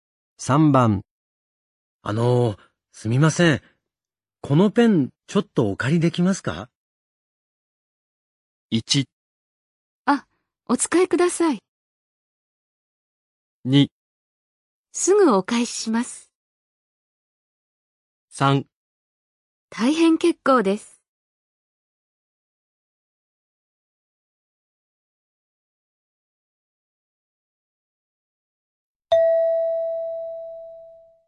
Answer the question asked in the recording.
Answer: 1

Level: N3 Listening · Test 9